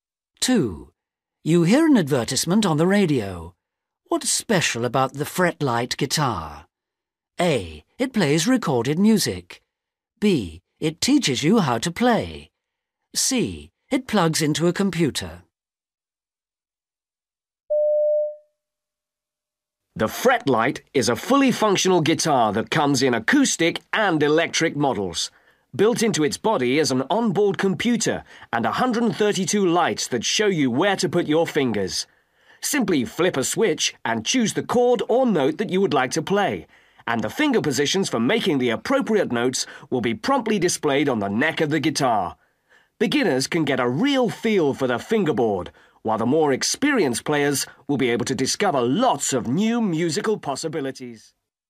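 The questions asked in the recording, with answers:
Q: What's special about the fretlight guitar?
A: B: It teaches you how to play.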